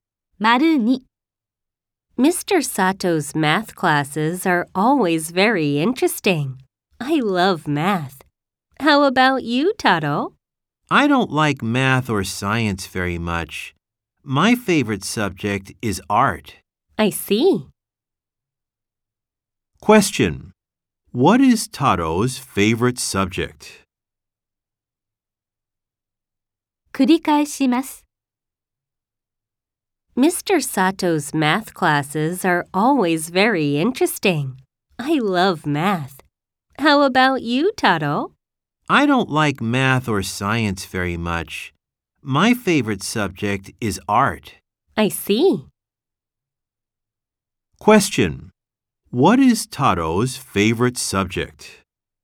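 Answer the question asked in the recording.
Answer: Art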